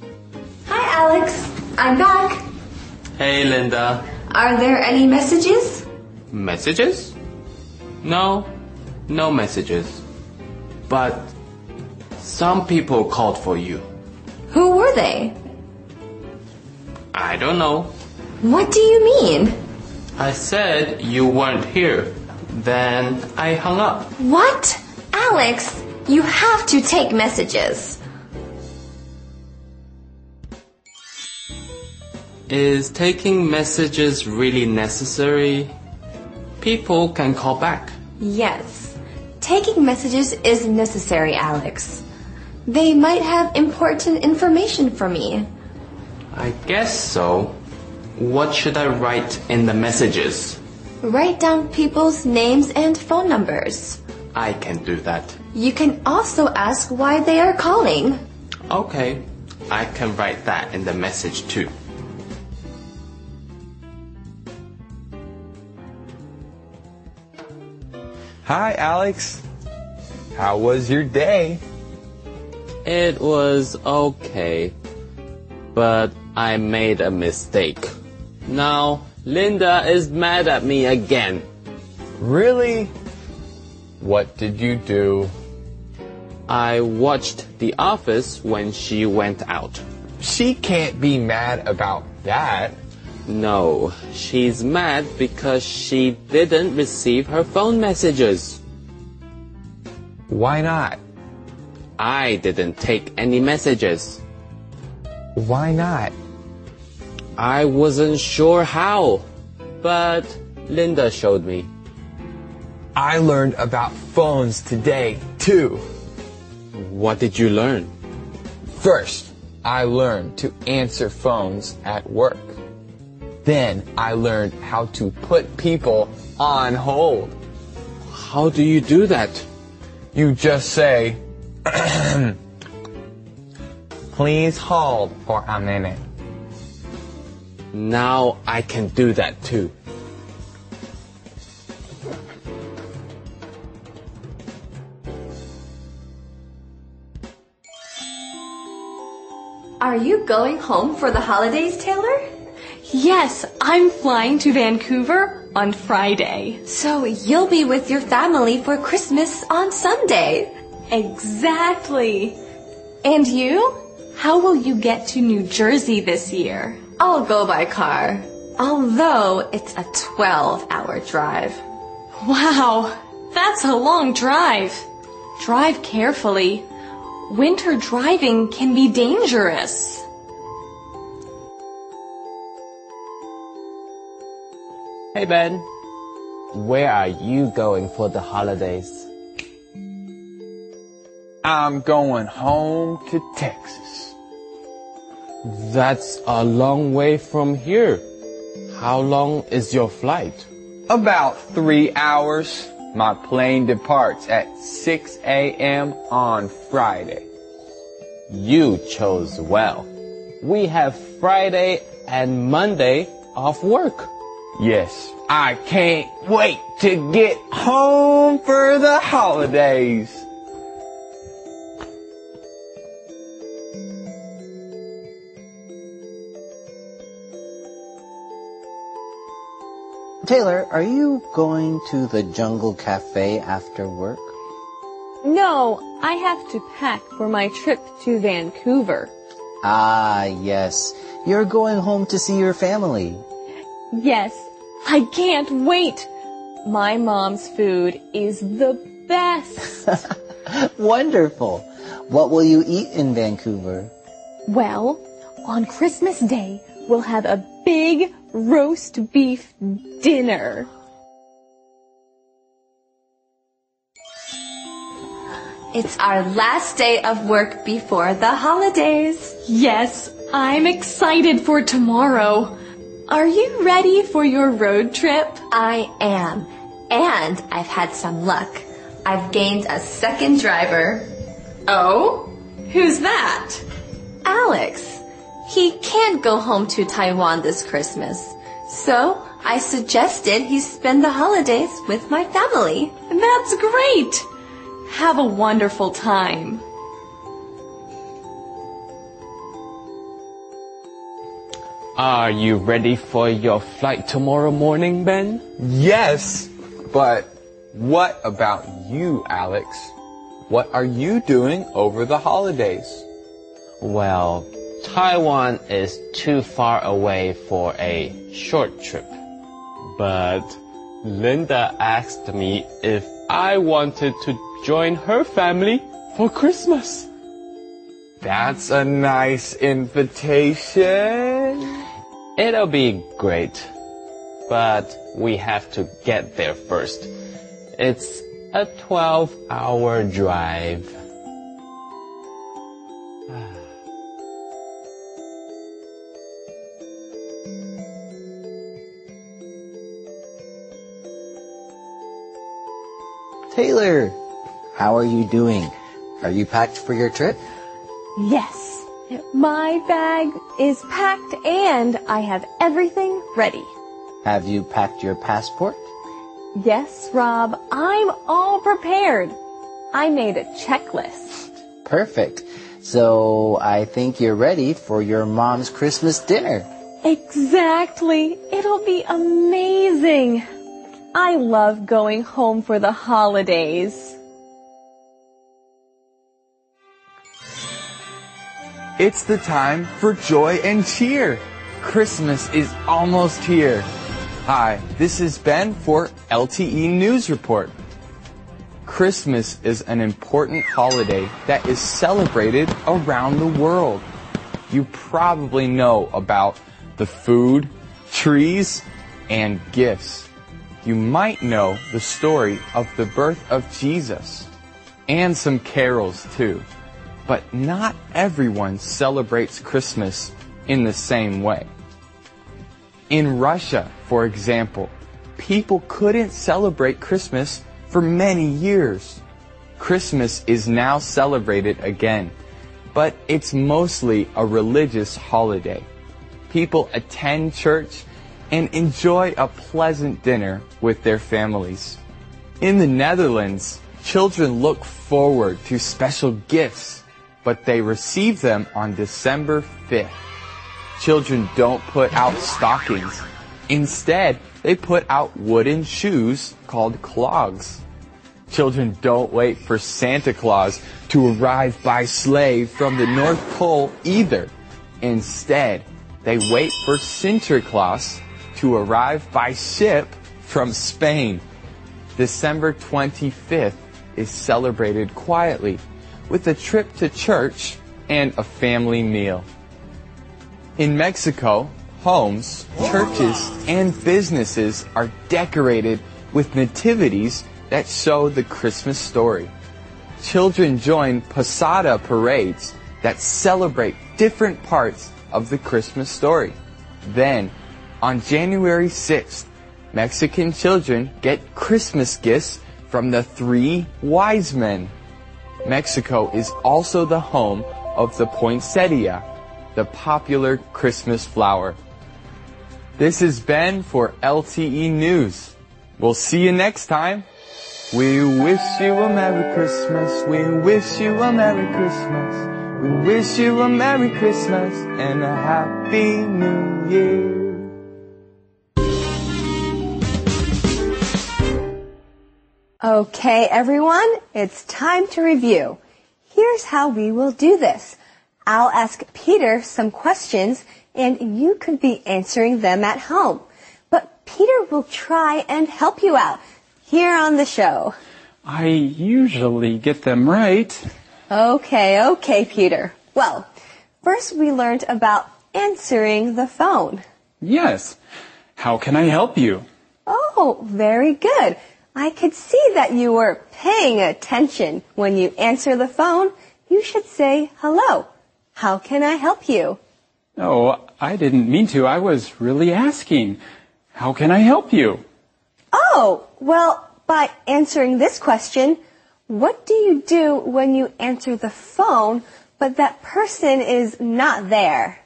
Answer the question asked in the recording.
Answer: if the person's not there, you should take a message.